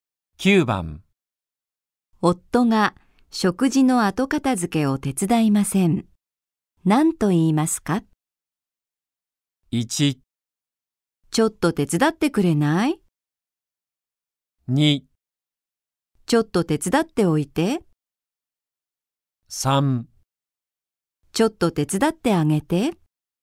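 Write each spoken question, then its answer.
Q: 夫が食事の後片付けを手伝いません。何と言いますか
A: 1: ちょっと手伝ってくれない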